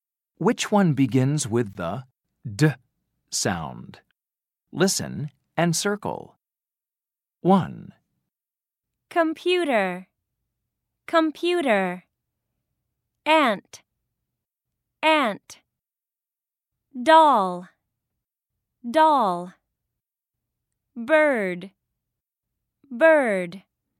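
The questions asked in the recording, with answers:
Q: Which one begins with the D sound?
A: Doll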